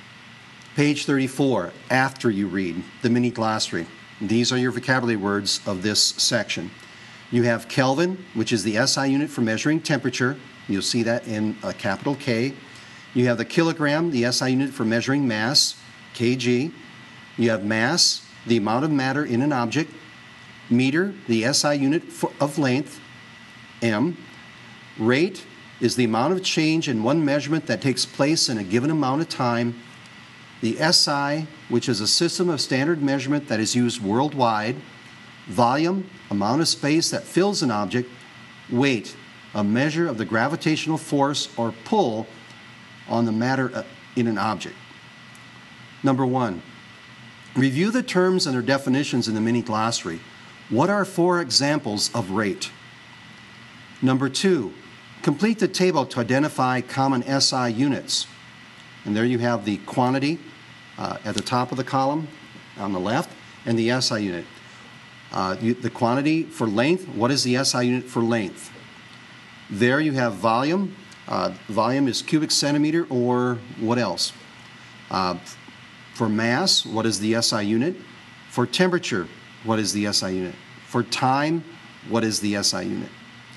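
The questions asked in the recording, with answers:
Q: The quantity for length, what is the SI unit for length?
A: meter

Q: For mass, what is the SI unit?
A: kilogram

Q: For temperature, what is the SI unit?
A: Kelvin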